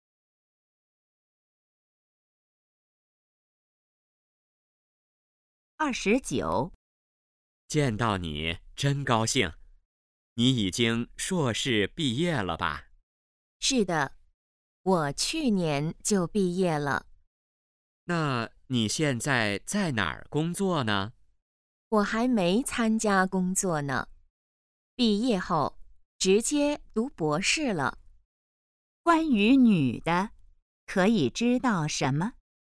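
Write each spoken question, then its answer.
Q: 关于女的,可以知道什么?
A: 在读博士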